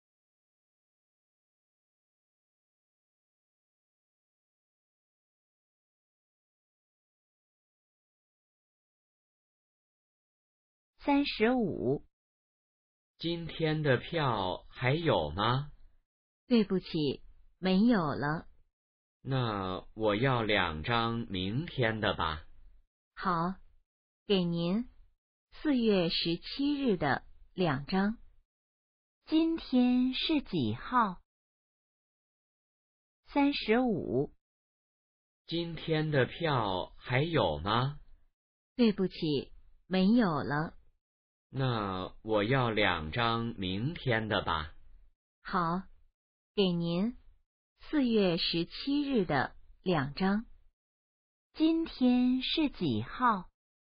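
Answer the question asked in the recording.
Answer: 4月16日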